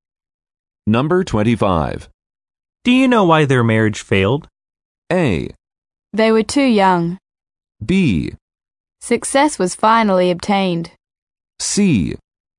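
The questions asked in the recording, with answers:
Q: Do you know why their marriage failed?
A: A: They were too young.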